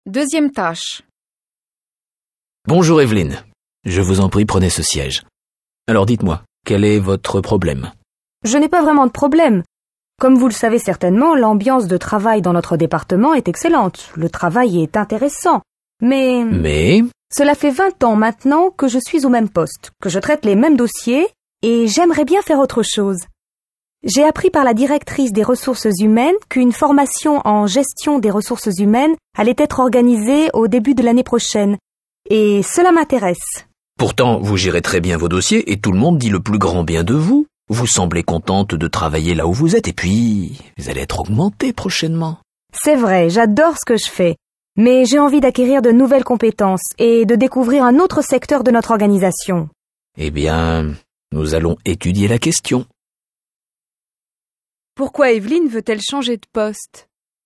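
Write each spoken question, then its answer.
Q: Pourquoi Evelyne veut-elle changer de poste ?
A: Elle fait le même travail depuis 20 ans et veut acquérir de nouvelles compétences et découvrir un autre secteur.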